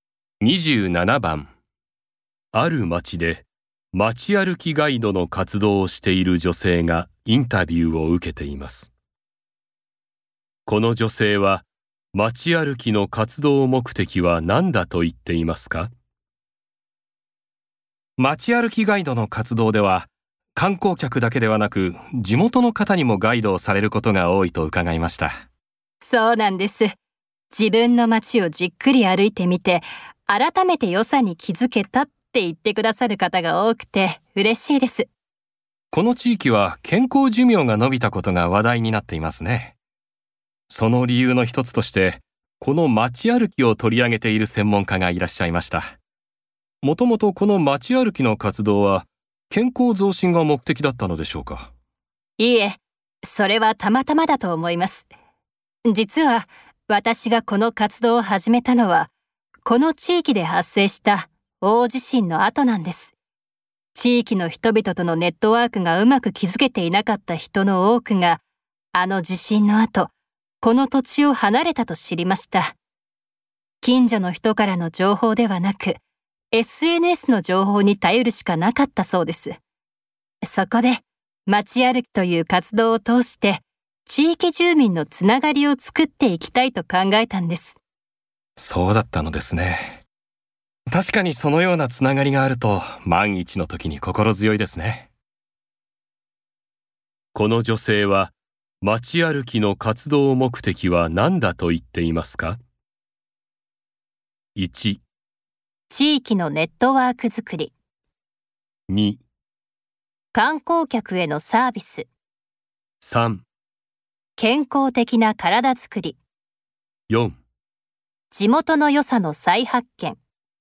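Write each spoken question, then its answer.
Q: この女性は街歩きの活動目的は何だと言っていますか?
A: 1: 地域のネットワーク作り。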